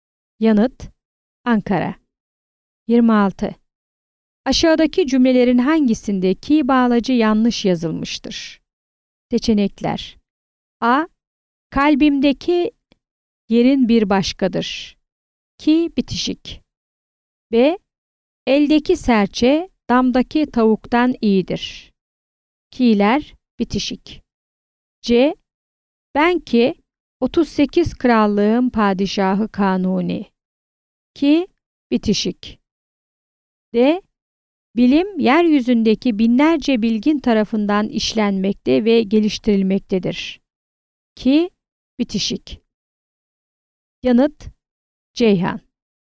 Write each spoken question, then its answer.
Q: Aşağıdaki cümlelerin hangisinde ki bağlacı yanlış yazılmıştır?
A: Yanıt: Ceyhan.